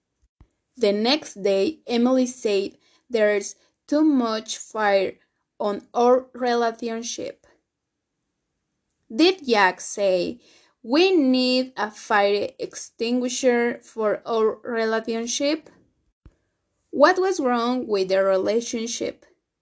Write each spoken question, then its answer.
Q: What was wrong with their relationship?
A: Fire! Emily said there was too much fire in their relationship.